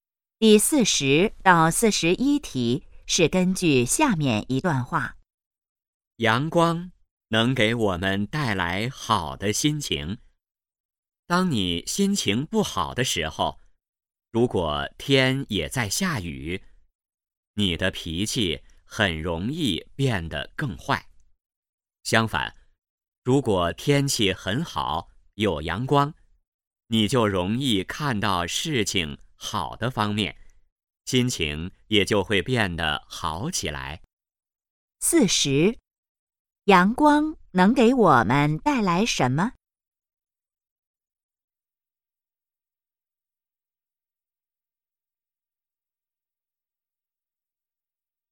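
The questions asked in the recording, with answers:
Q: 阳光能给我们带来什么?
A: 好的心情

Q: 这段话主要谈什么?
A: 阳光对心情的影响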